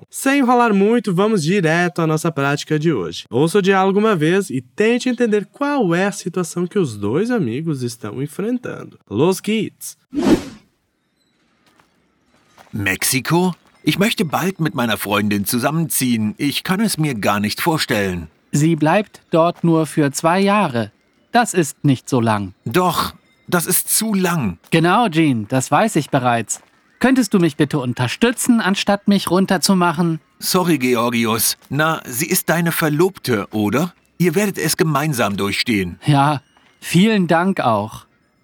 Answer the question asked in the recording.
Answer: A namorada do Georgios vai passar dois anos no México e ele queria o apoio do amigo dele por estar longe da amada